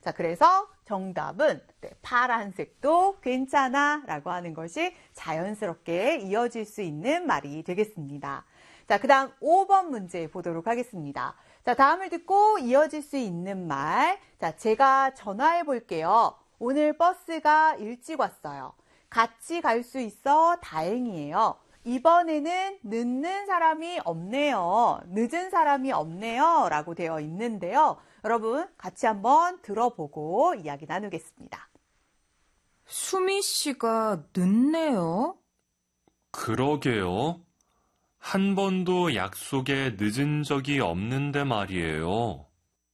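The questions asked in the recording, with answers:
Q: 자, 다음을 듣고 이어질 수 있는 말.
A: 1: 제가 전화해 볼게요.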